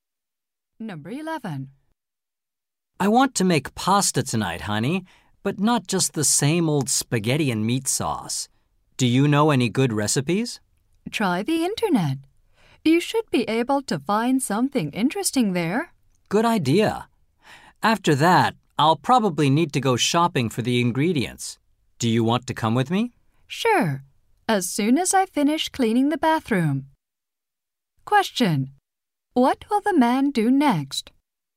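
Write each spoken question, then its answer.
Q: What will the man do next?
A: Finish cleaning the bathroom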